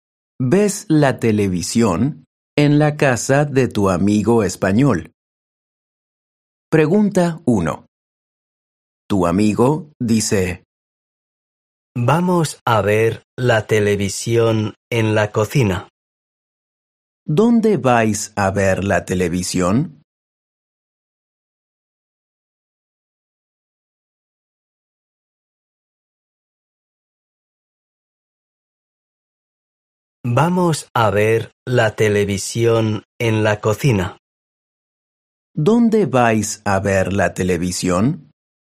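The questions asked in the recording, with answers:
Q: ¿Dónde vais a ver la televisión?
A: En la cocina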